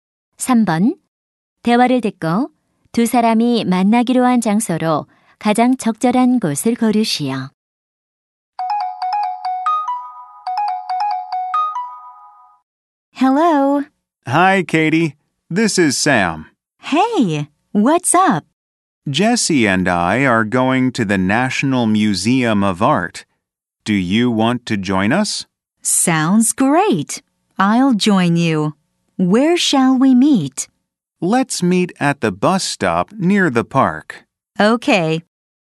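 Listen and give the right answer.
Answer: 공원 근처 버스 정류장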